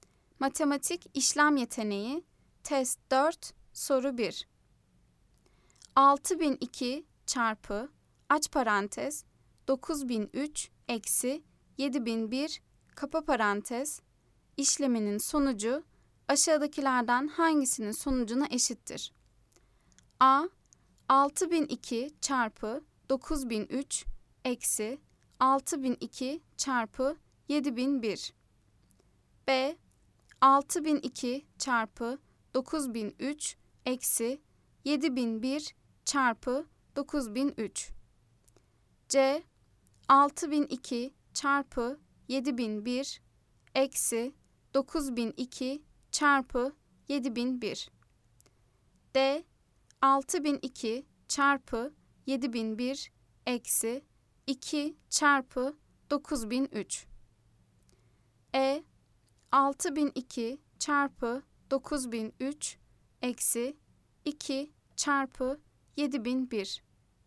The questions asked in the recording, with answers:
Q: 6002 çarpı, aç parantez, 9003 eksi, 7001, kapa parantez, işleminin sonucu, aşağıdakilerden hangisinin sonucuna eşittir?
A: Cevap: Adana. 6002 çarpı 9003 eksi 6002 çarpı 7001.